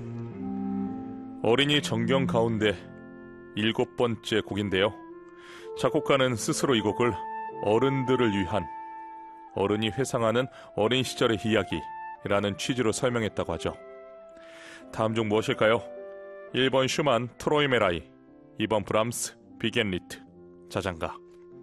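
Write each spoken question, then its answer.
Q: 다음 중 무엇일까요? 1번 슈만 트로이메라이, 2번 브람스 비겐리트 자장가.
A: 1: 슈만 트로이메라이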